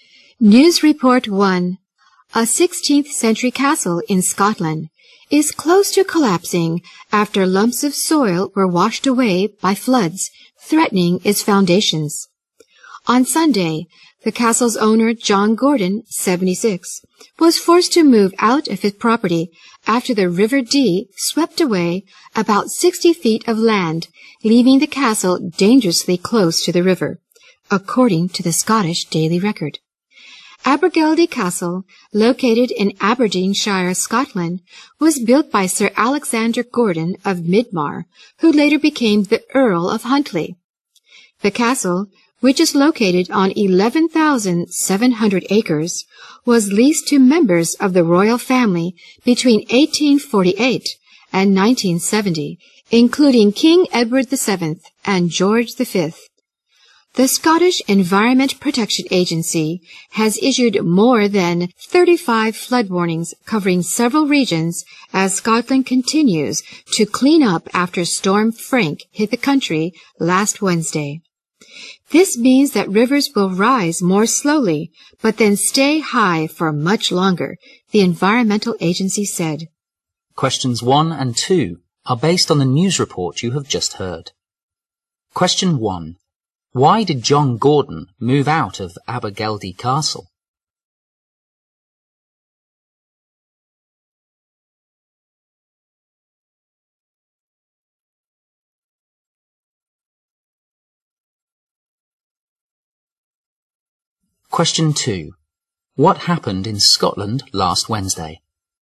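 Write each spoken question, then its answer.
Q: Why did John Gordon move out of Abergeldy Castle?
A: The river swept away land, leaving the castle dangerously close to collapse

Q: What happened in Scotland last Wednesday?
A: Storm Frank hit the country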